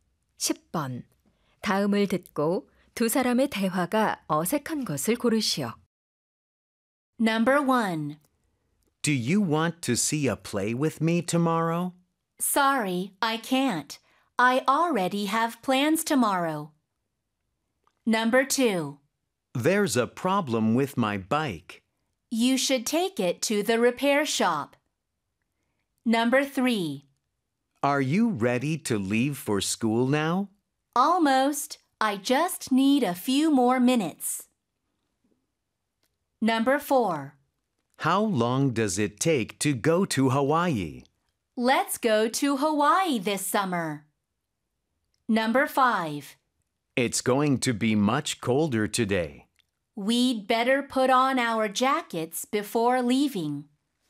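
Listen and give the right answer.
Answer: 4: How long does it take to go to Hawaii? / Let's go to Hawaii this summer.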